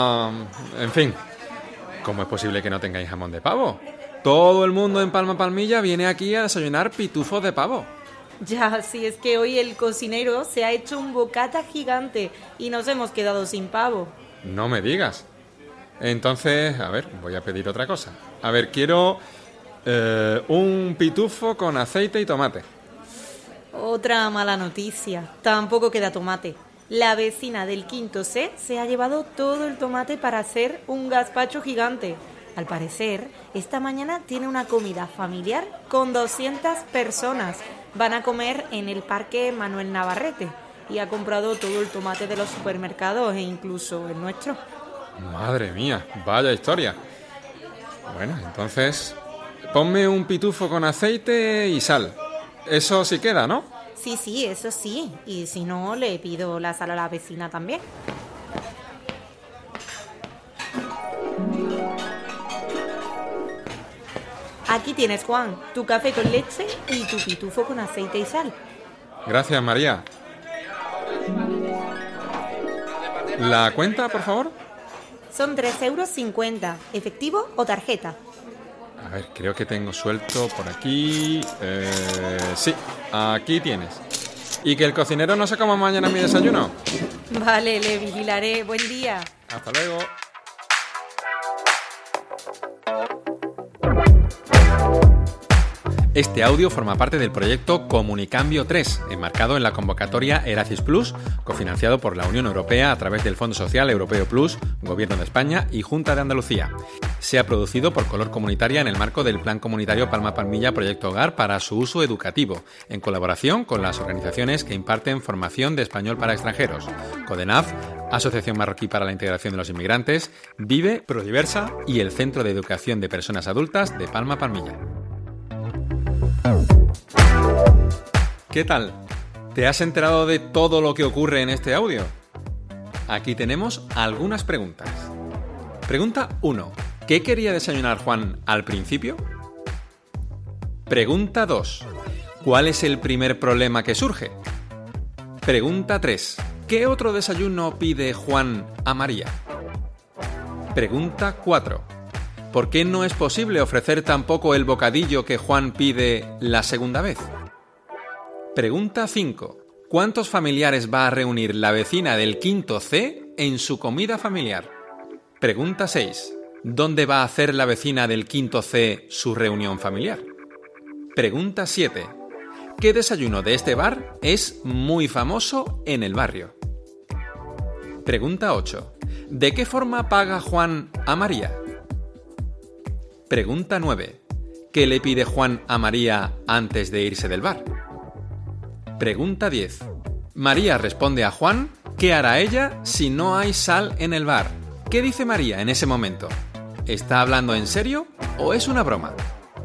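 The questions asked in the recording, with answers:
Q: ¿Qué quería desayunar Juan al principio?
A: Un pitufo de jamón de pavo

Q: ¿Cuál es el primer problema que surge?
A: No queda pavo porque el cocinero se hizo un bocata gigante

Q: ¿Qué otro desayuno pide Juan a María?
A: Un pitufo con aceite y tomate

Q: ¿Por qué no es posible ofrecer tampoco el bocadillo que Juan pide la segunda vez?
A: Porque no queda tomate: la vecina del quinto C se lo llevó todo para hacer un gazpacho gigante

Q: ¿Cuántos familiares va a reunir la vecina del quinto C en su comida familiar?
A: 200 personas

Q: ¿Dónde va a hacer la vecina del quinto C su reunión familiar?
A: En el Parque Manuel Navarrete

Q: ¿Qué desayuno de este bar es muy famoso en el barrio?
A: Los pitufos de pavo

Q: ¿De qué forma paga Juan a María?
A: En efectivo

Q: ¿Qué le pide Juan a María antes de irse del bar?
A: Que el cocinero no se coma mañana su desayuno

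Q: María responde a Juan, ¿qué hará ella si no hay sal en el bar?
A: Pedirle la sal a la vecina; es una broma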